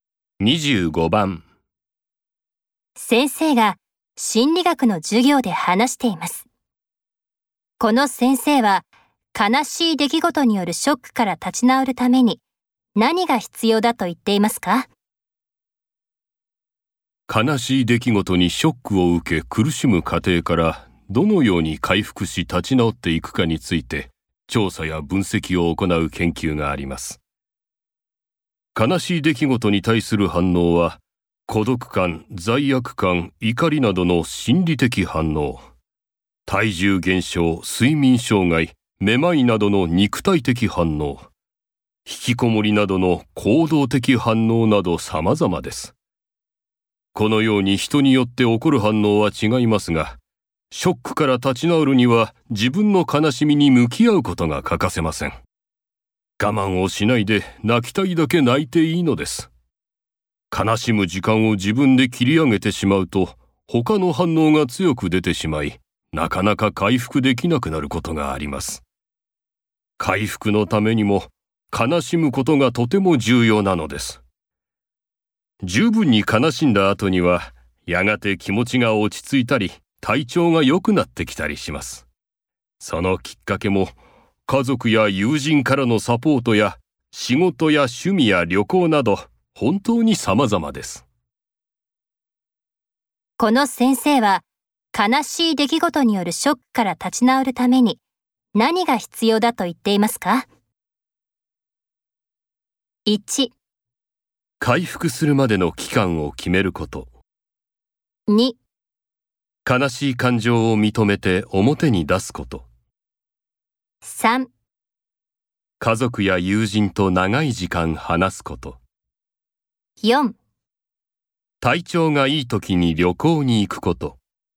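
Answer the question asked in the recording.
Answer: 2: 悲しい感情を認めて表に出すこと。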